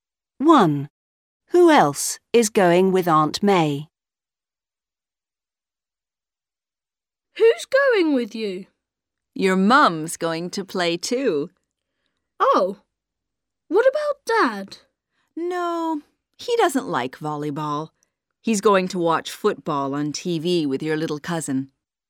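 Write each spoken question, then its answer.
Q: Who else is going with Aunt May?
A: Tom's mum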